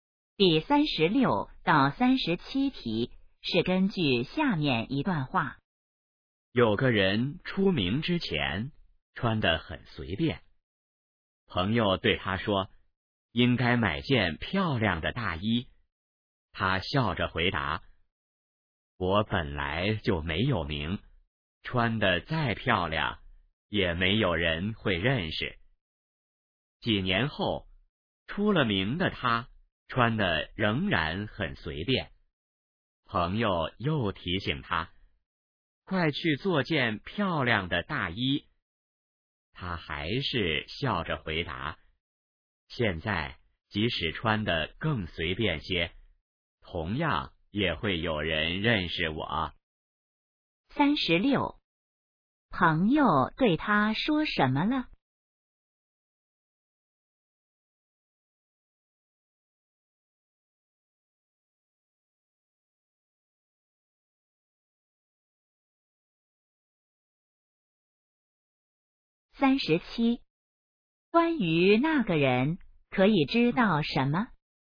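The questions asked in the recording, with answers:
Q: 朋友对他说什么了?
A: 应该买件漂亮的大衣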